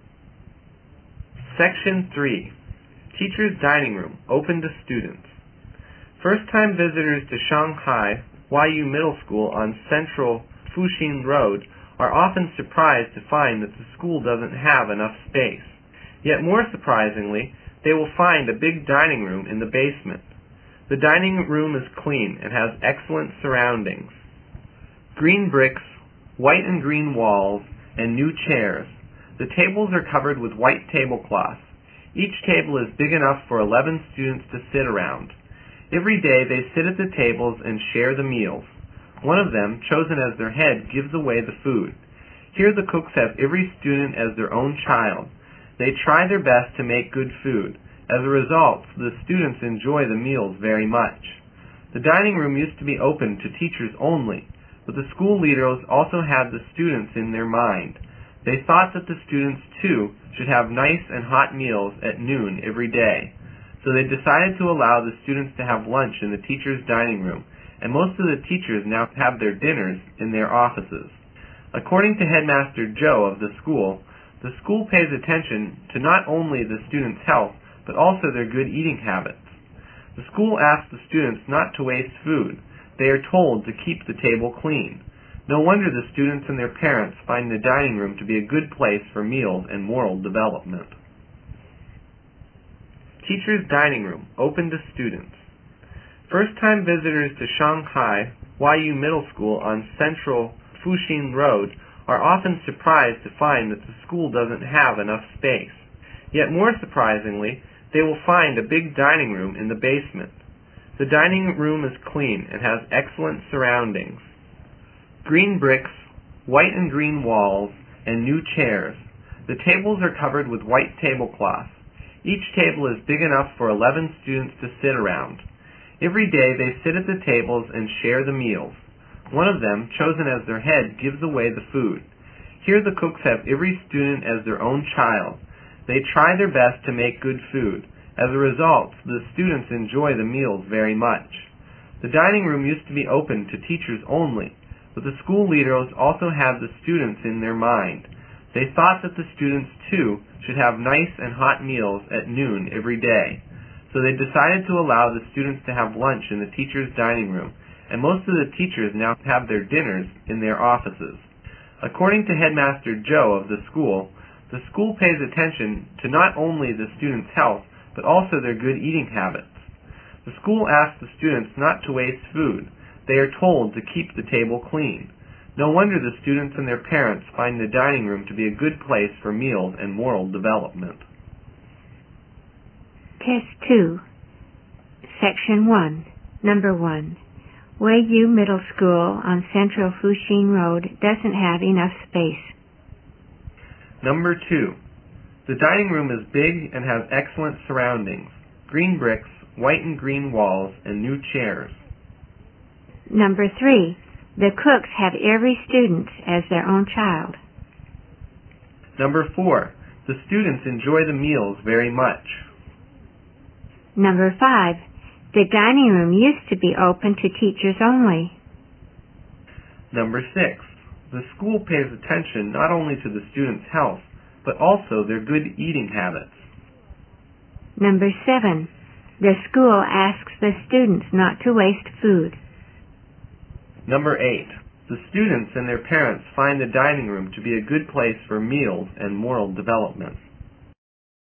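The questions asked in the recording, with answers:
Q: Weiyu Middle School on Central Fuxing Road doesn't have enough space.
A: True

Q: The cooks have every student as their own child.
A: True

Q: The students enjoy the meals very much.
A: True

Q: The dining room used to be open to teachers only.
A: True

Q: The school pays attention not only to the students' health, but also their good eating habits.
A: True

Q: The school asks the students not to waste food.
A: True

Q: The students and their parents find the dining room to be a good place for meals and moral development.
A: True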